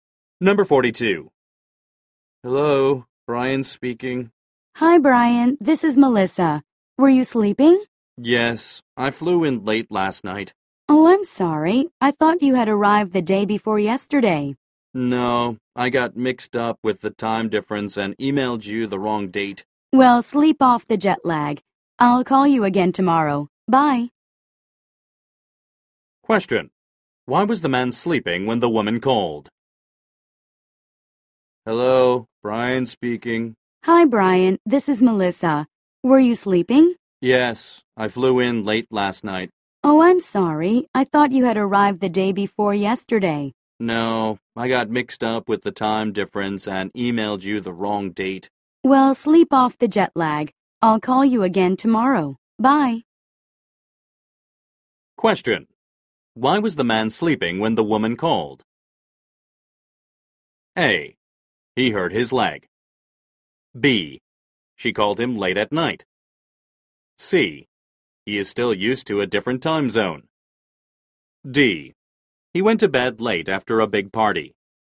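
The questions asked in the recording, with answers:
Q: Why was the man sleeping when the woman called?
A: C: He is still used to a different time zone.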